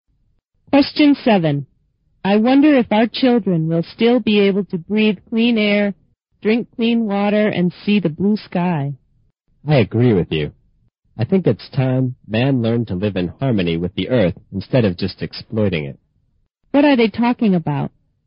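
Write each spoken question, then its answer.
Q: What are they talking about?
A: Protecting the environment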